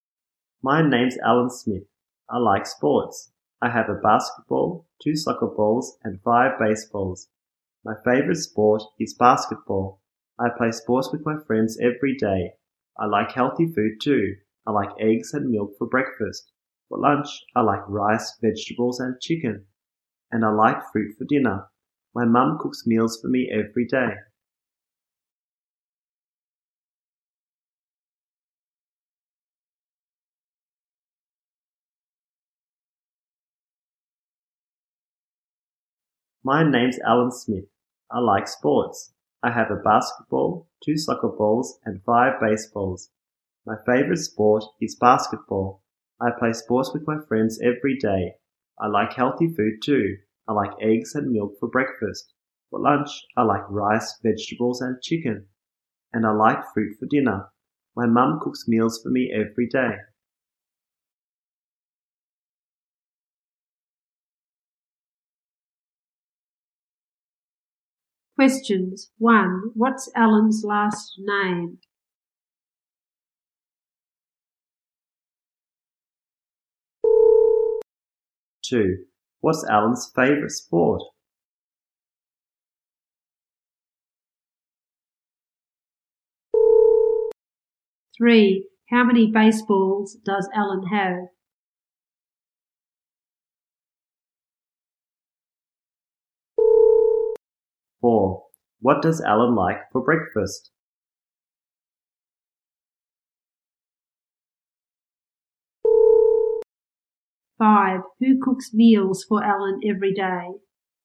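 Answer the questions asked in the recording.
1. Smith
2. Basketball
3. Five
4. Eggs and milk
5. His mum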